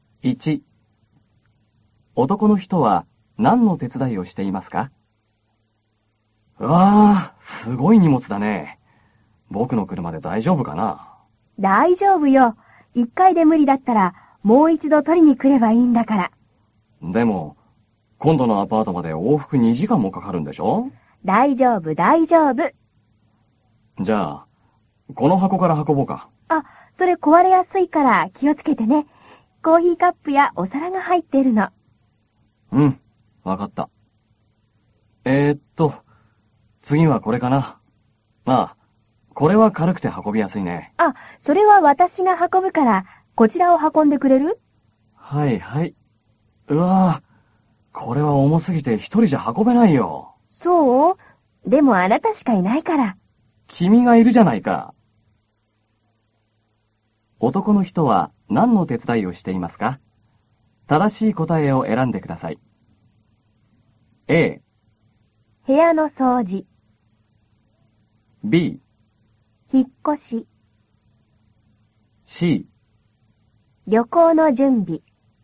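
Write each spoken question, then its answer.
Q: 男の人は何の手伝いをしていますか?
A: B: 引っ越し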